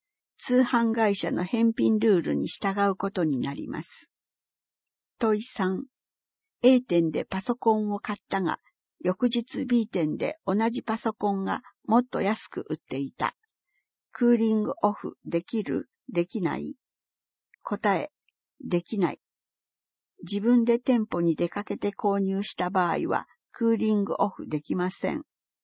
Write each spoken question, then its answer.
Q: A 店でパソコンを買ったが、翌日 B 店で同じパソコンがもっと安く売っていた。クーリングオフできる?できない?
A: 答え、できない。